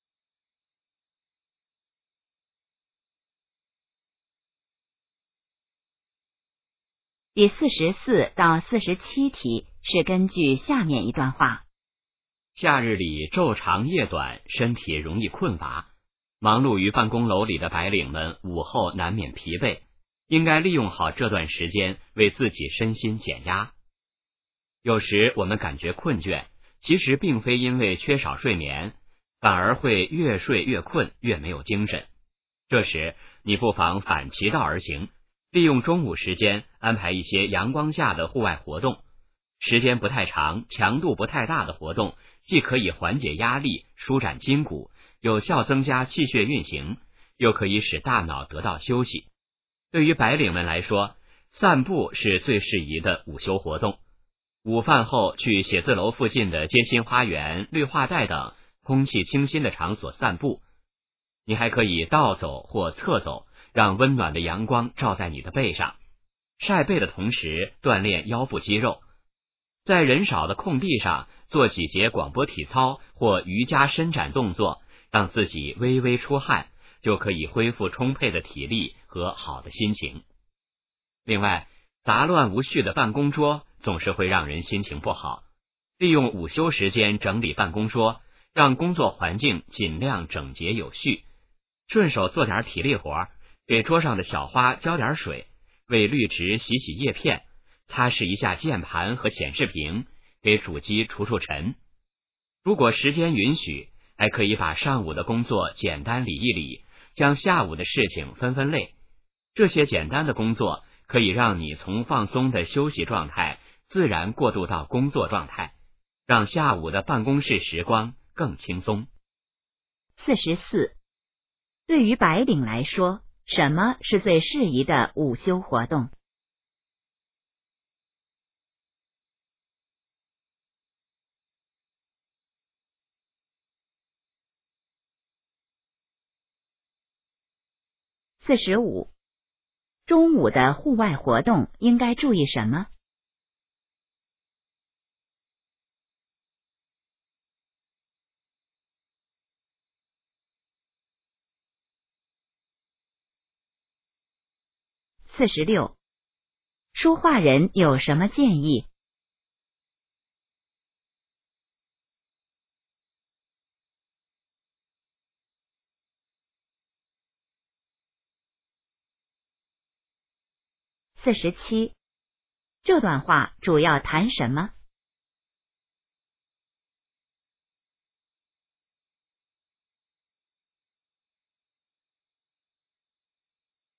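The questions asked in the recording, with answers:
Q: 对于白领来说,什么是最适宜的午休活动?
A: 散步

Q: 中午的户外活动应该注意什么?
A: 时间不太长、强度不太大

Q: 说话人有什么建议?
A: 利用午休时间整理办公桌

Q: 这段话主要谈什么?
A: 白领如何利用午休减压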